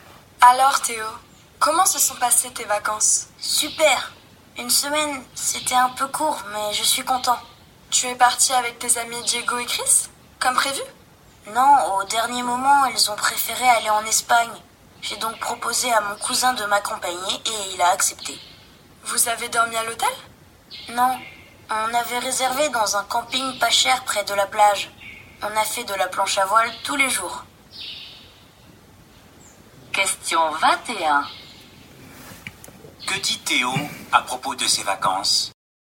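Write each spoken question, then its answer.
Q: Que dit Théo à propos de ses vacances ?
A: Il est parti avec son cousin dans un camping près de la plage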